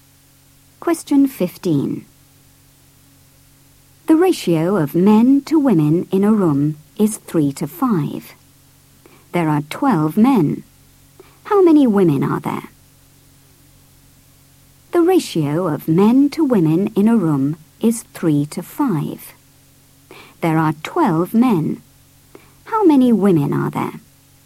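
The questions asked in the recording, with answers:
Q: There are 12 men. How many women are there?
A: 20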